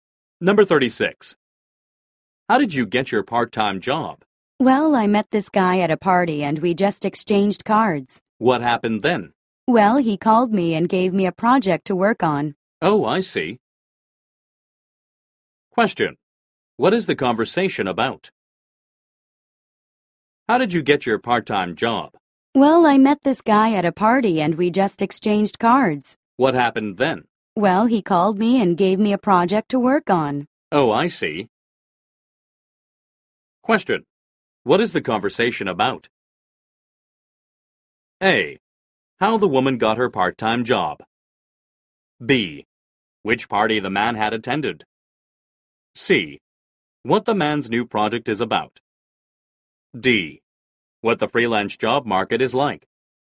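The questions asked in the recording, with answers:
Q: What is the conversation about?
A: A: How the woman got her part-time job.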